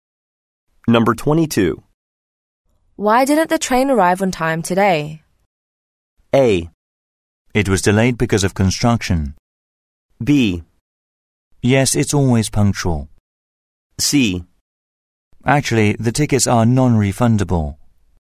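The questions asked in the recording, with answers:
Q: Why didn't the train arrive on time today?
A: A: It was delayed because of construction.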